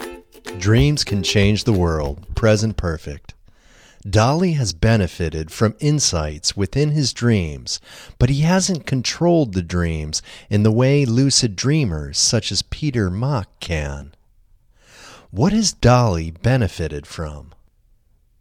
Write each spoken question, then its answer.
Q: What has Dolly benefited from?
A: Dolly has benefited from insights within his dreams.